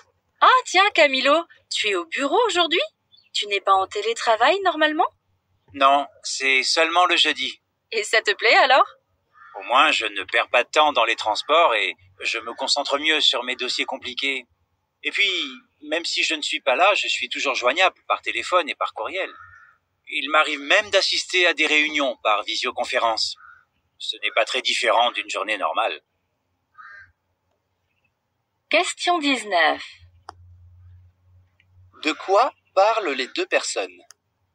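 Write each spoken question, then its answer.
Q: De quoi parlent les deux personnes?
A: Du télétravail de Camilo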